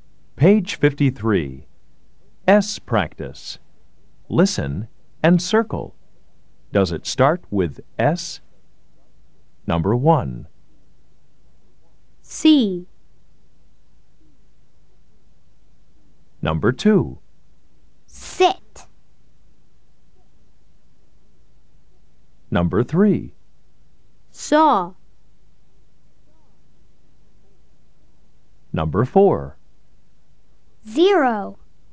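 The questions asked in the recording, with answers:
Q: Does it start with S?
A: Yes

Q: Does it start with S?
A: Yes

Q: Does it start with S?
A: No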